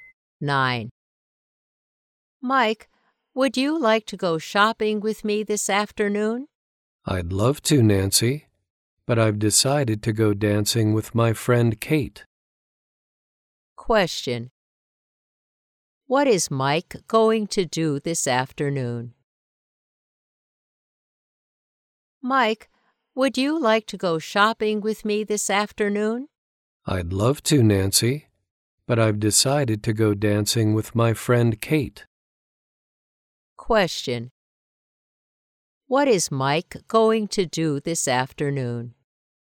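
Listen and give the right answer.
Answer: Go dancing with Kate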